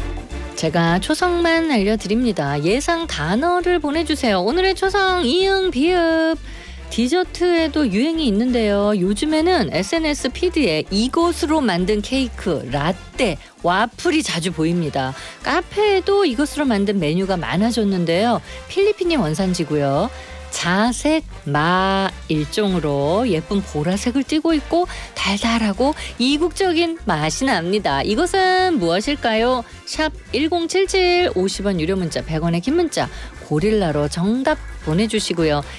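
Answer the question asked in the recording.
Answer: 우베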